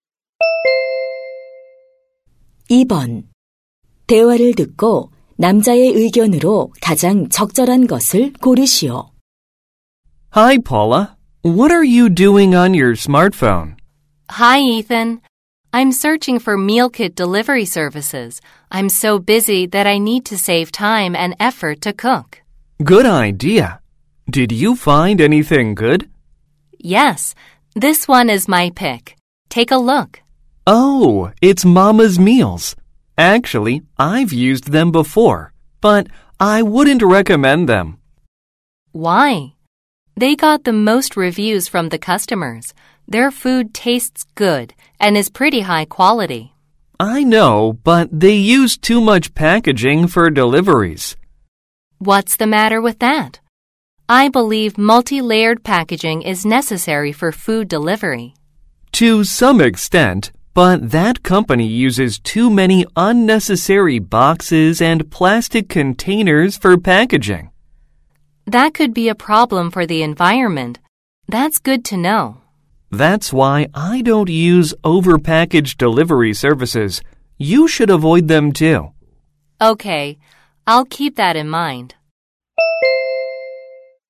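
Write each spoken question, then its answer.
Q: 대화를 듣고 남자의 의견으로 가장 적절한 것을 고르시오.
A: 과대 포장하는 배달 서비스는 이용하지 말아야 한다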